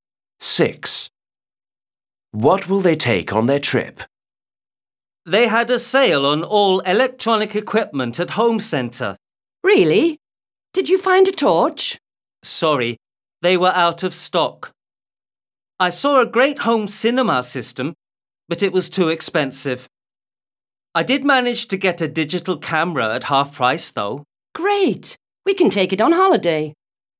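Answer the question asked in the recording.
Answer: A digital camera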